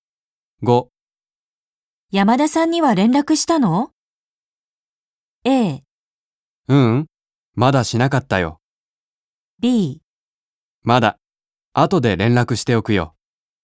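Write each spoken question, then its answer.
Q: 山田さんには連絡したの?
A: B: まだ、後で連絡しておくよ。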